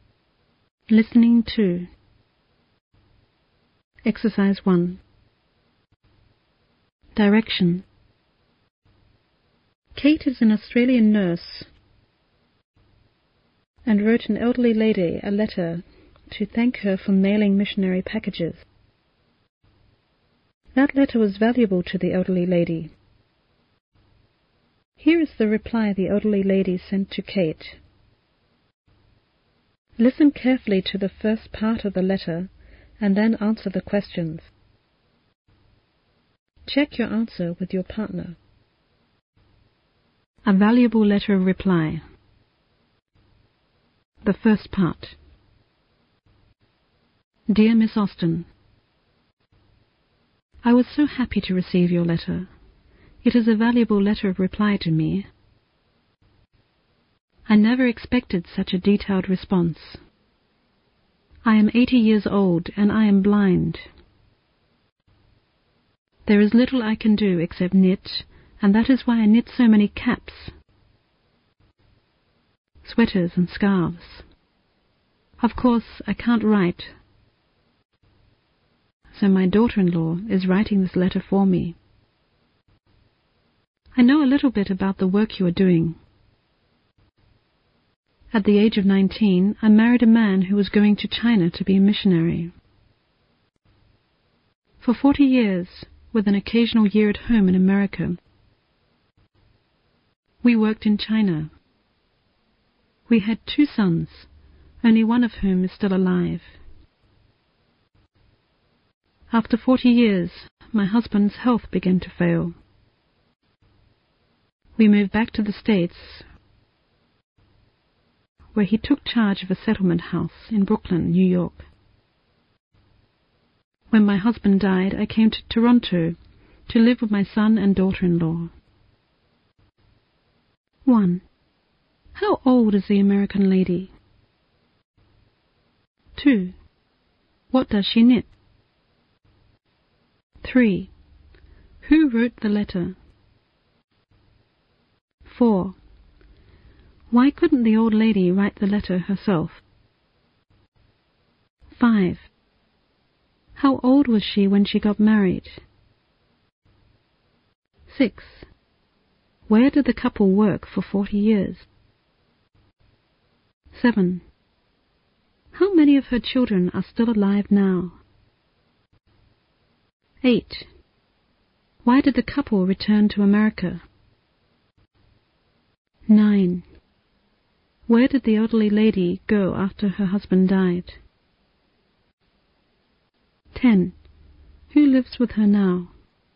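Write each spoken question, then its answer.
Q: How old is the American lady?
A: 80 years old

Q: What does she knit?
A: Caps, sweaters and scarves

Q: Who wrote the letter?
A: Her daughter-in-law

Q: Why couldn't the old lady write the letter herself?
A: She is blind

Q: How old was she when she got married?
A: 19

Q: Where did the couple work for 40 years?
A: In China

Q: How many of her children are still alive now?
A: One

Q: Why did the couple return to America?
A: Her husband's health began to fail

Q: Where did the elderly lady go after her husband died?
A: To Toronto

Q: Who lives with her now?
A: Her son and daughter-in-law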